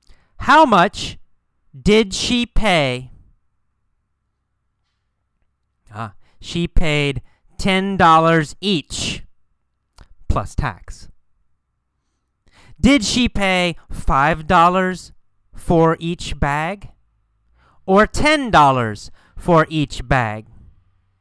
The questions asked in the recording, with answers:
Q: Did she pay $5 for each bag or $10 for each bag?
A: She paid $10. $10 for each bag.